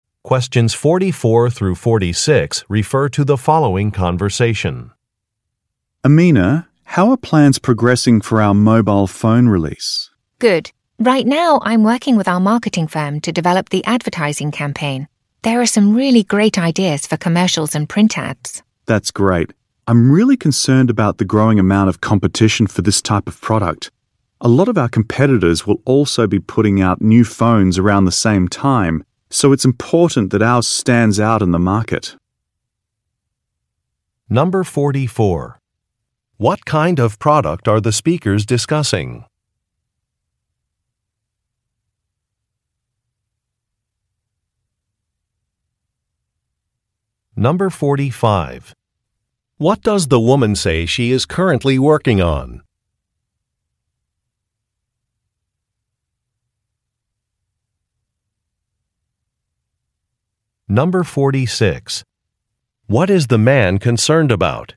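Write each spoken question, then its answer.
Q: What kind of product are the speakers discussing?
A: A mobile phone

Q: What does the woman say she is currently working on?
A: An advertising campaign

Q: What is the man concerned about?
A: Growing competition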